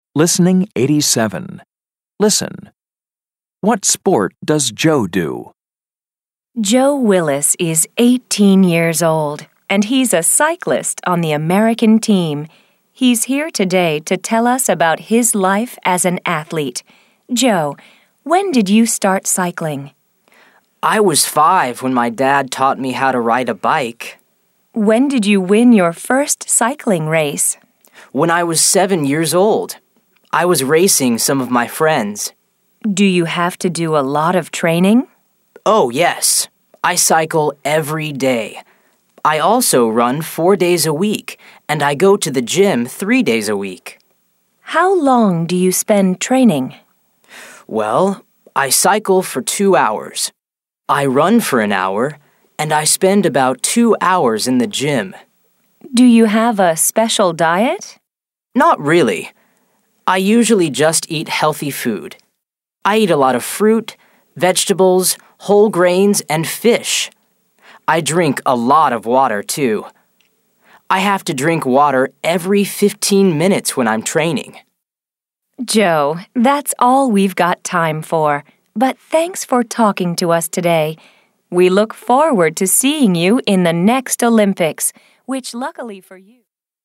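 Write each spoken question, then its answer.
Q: What sport does Joe do?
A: Cycling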